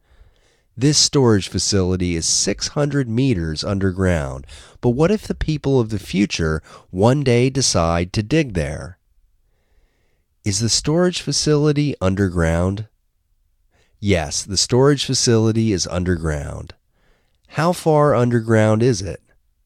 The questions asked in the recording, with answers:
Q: How far underground is it?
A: It is 600 meters underground.